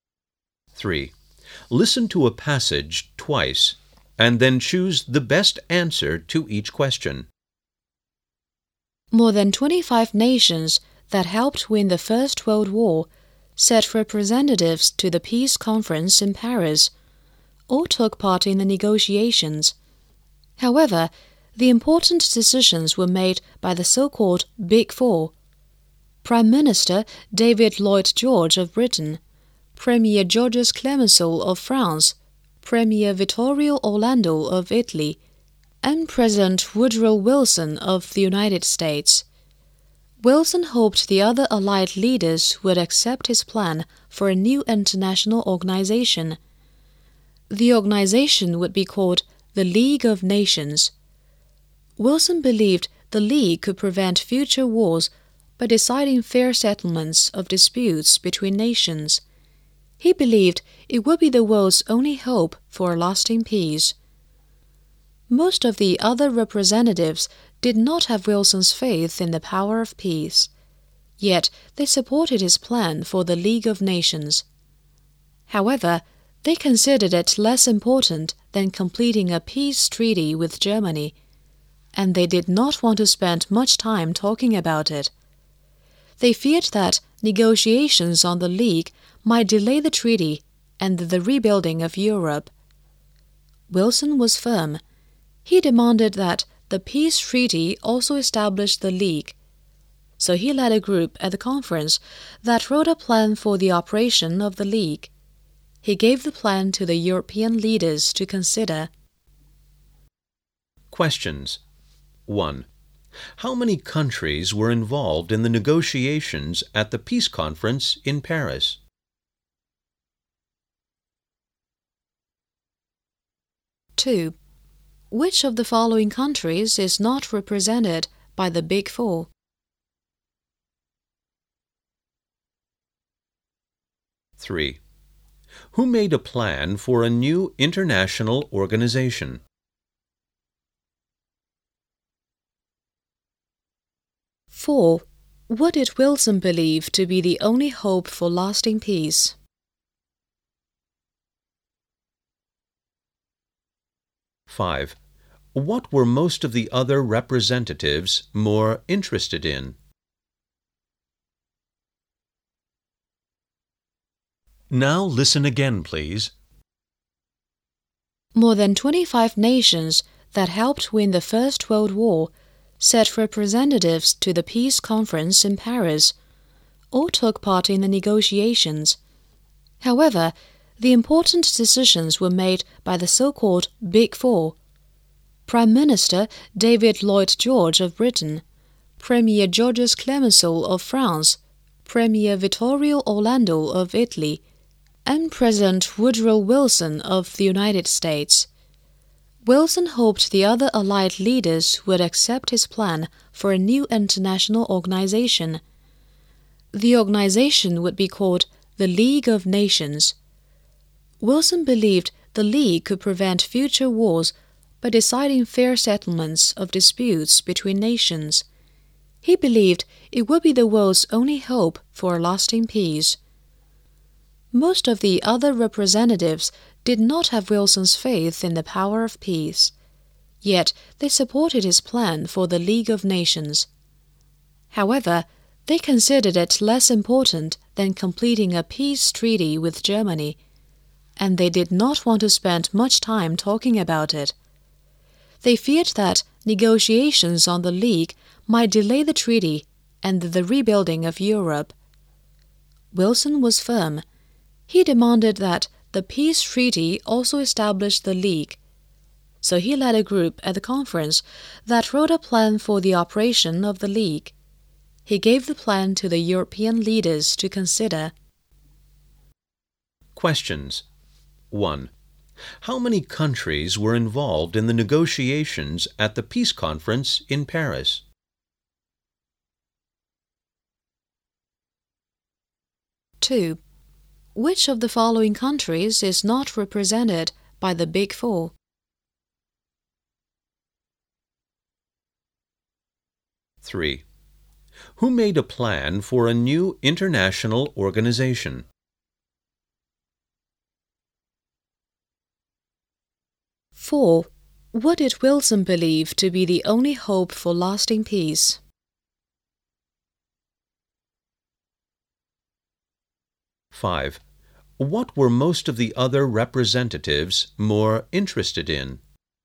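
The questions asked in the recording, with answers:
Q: How many countries were involved in the negotiations at the peace conference in Paris?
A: More than 25

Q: Who made a plan for a new international organization?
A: President Woodrow Wilson

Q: What did Wilson believe to be the only hope for lasting peace?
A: The League of Nations

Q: What were most of the other representatives more interested in?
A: Completing a peace treaty with Germany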